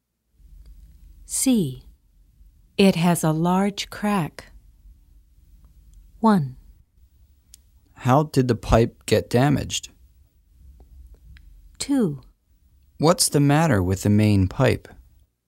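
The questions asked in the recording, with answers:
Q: It has a large crack.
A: 2: What's the matter with the main pipe?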